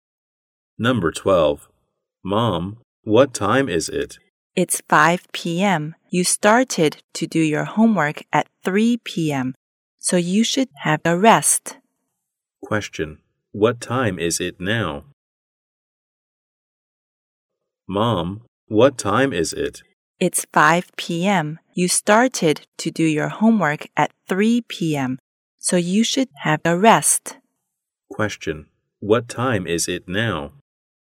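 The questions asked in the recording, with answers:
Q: What time is it now?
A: 5 p.m.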